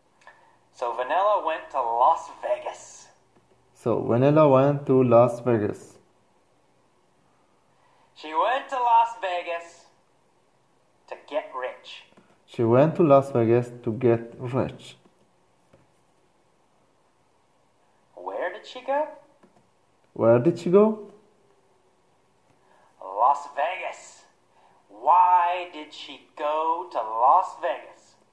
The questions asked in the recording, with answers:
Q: Where did she go?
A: Las Vegas.

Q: Why did she go to Las Vegas?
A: To get rich, of course. She went to Las Vegas to get rich.